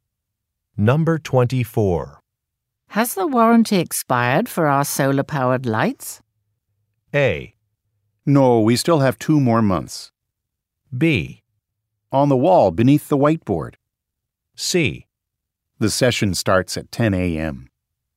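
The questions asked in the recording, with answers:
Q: Has the warranty expired for our solar-powered lights?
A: A: No, we still have 2 more months.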